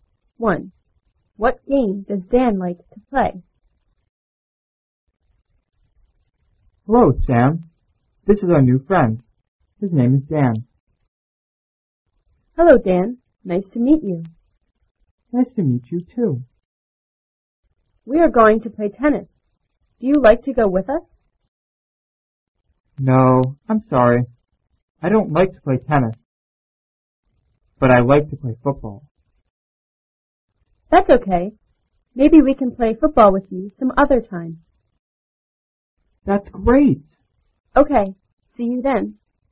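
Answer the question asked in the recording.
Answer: Football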